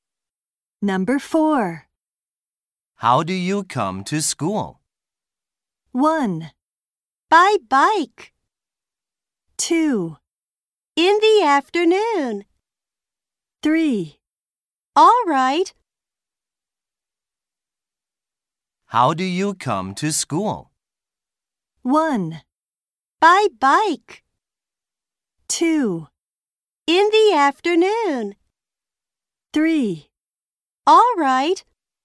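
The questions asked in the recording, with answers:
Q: How do you come to school?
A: 1: By bike.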